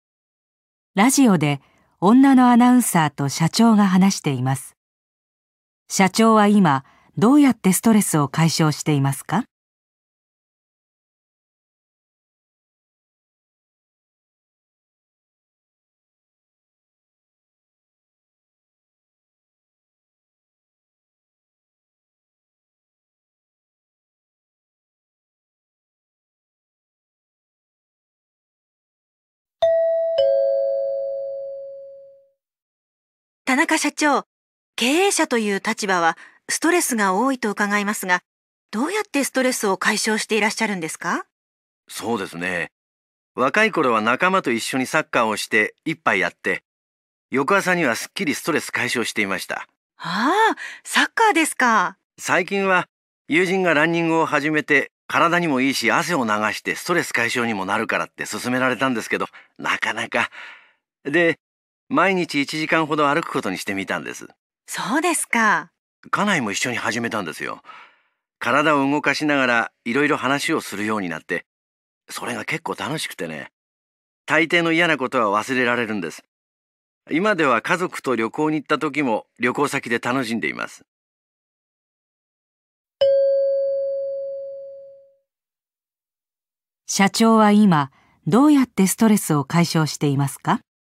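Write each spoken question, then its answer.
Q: 社長は今どうやってストレスを解消していますか?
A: 毎日1時間ほど奥さんと歩いている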